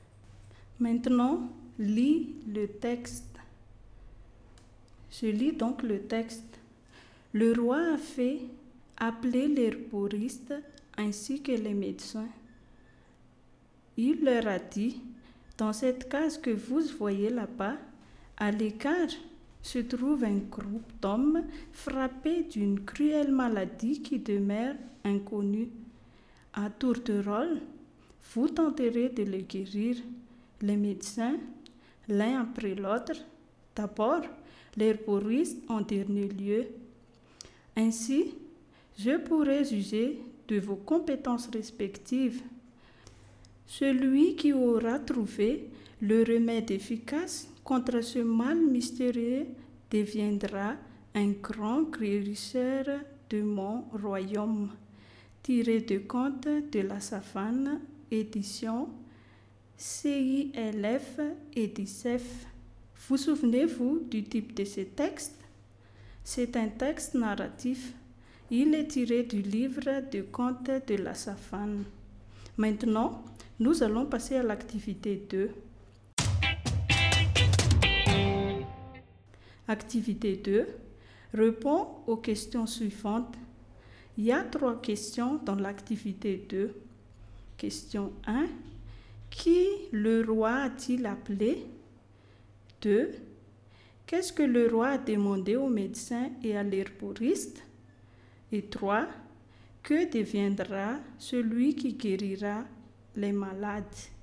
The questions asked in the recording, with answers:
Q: Qui le roi a-t-il appelé?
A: Le roi a appelé l'herboriste et les médecins.

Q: Qu'est-ce que le roi a demandé aux médecins et à l'herboriste?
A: Le roi a demandé aux médecins et à l'herboriste de guérir un groupe d'hommes atteints d'une maladie inconnue, donc d'un groupe d'hommes malades.

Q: Que deviendra celui qui guérira les malades?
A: Celui qui guérira les malades deviendra le grand guérisseur du royaume.